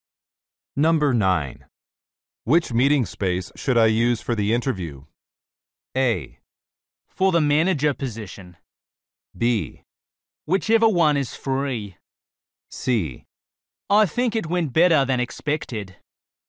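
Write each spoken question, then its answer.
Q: Which meeting space should I use for the interview?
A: B: Whichever one is free.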